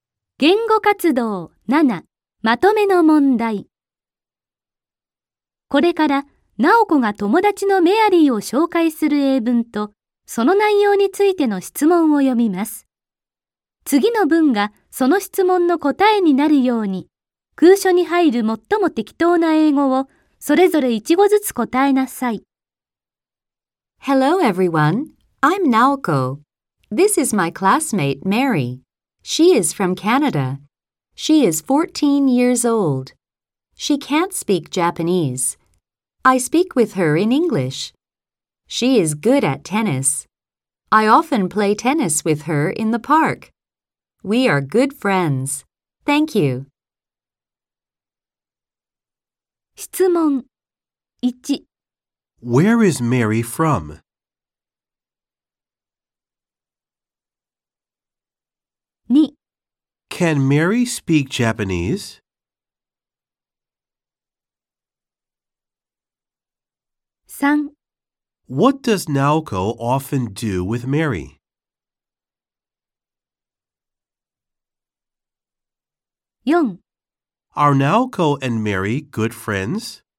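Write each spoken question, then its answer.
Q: Where is Mary from?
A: She is from Canada.

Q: Can Mary speak Japanese?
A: No, she can't.

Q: What does Naoko often do with Mary?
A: She often plays tennis with Mary in the park.

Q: Are Naoko and Mary good friends?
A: Yes, they are.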